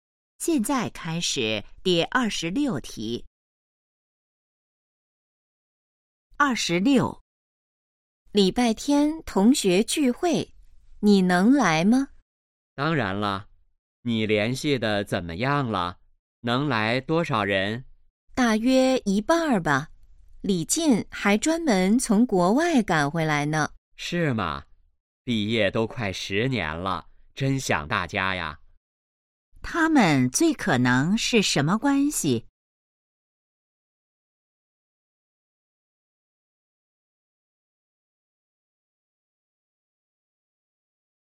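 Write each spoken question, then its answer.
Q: 他们最可能是什么关系?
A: 同学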